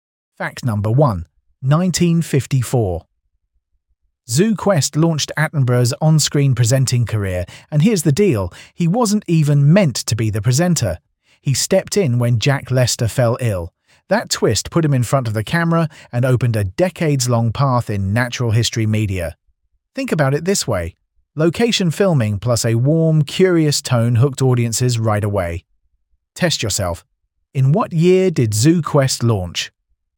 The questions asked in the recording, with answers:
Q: In what year did ZooQuest launch?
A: Correct answer, 1954.